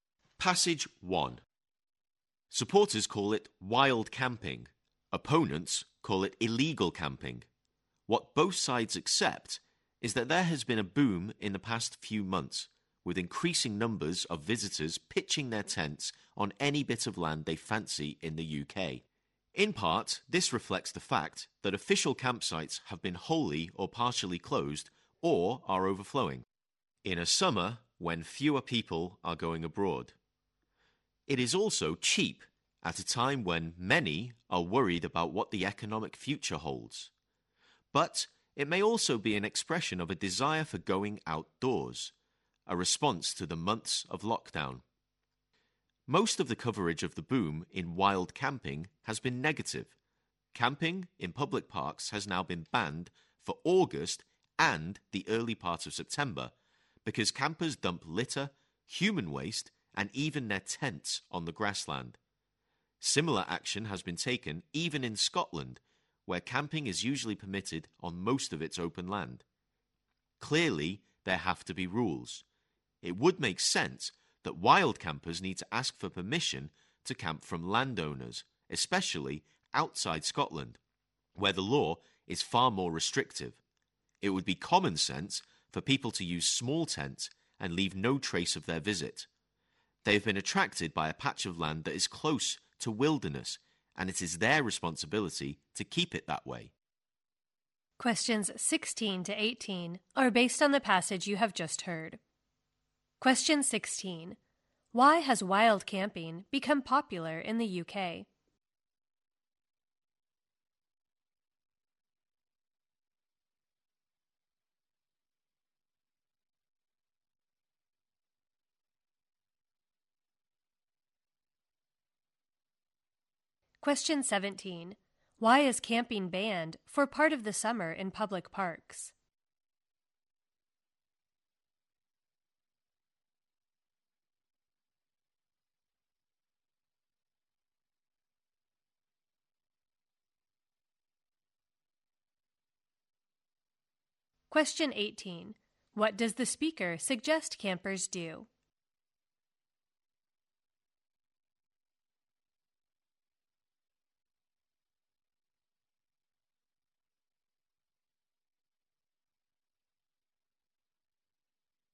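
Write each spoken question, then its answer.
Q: Why has wild camping become popular in the UK?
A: Official campsites are closed or full, it is cheap, and people want to be outdoors after lockdown

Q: Why is camping banned for part of the summer in public parks?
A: Campers dump litter, human waste and tents on the grassland

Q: What does the speaker suggest campers do?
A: Ask landowners for permission, use small tents and leave no trace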